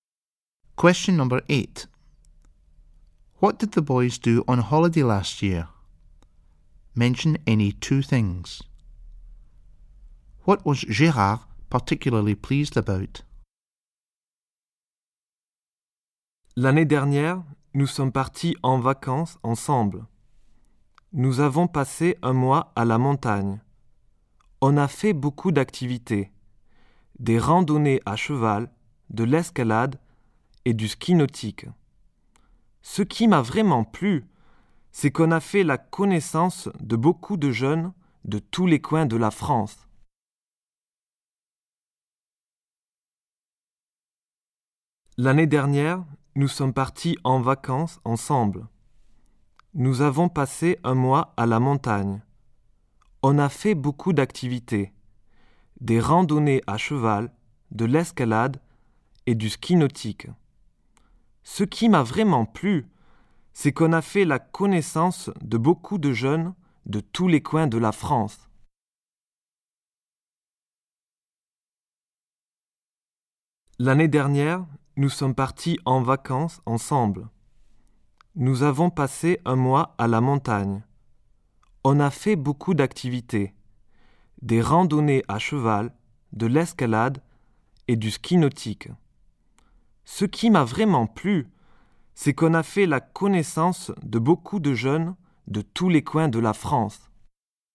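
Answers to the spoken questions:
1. Any two of: horse riding, climbing, water skiing (spent a month in the mountains)
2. Meeting lots of young people from all over France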